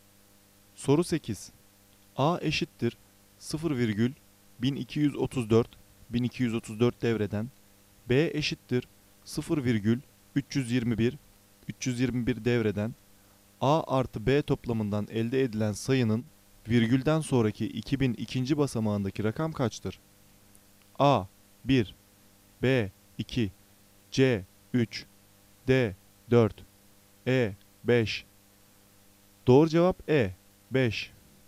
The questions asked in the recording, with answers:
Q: 0,321 321 devreden, A artı B toplamından elde edilen sayının virgülden sonraki 2000 ikinci basamağındaki rakam kaçtır?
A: Doğru cevap E 5.